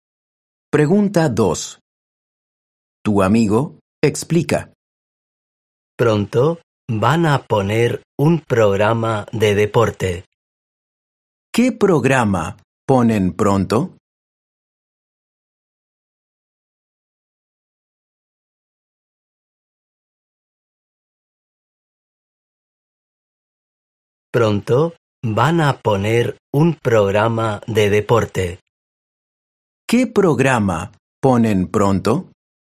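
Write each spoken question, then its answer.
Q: ¿Qué programa ponen pronto?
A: Un programa de deporte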